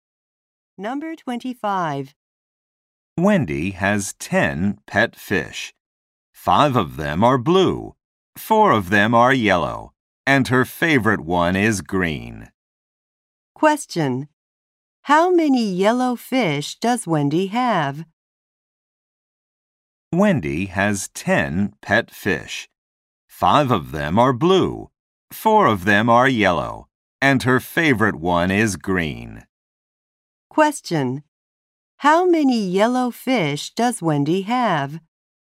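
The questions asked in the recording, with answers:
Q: How many yellow fish does Wendy have?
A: Four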